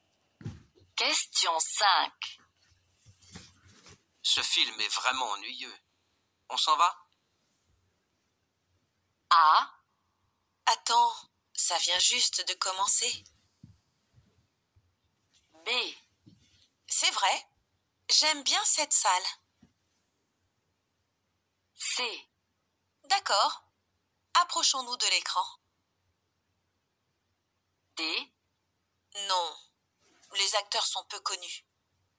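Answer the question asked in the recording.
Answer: A: Attends, ça vient juste de commencer.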